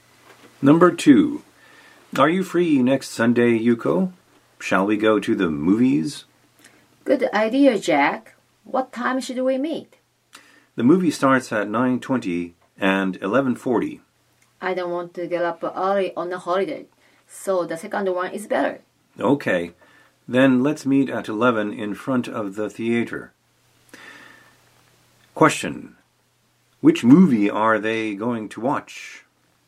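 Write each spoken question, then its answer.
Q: Which movie are they going to watch?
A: The one at 11:40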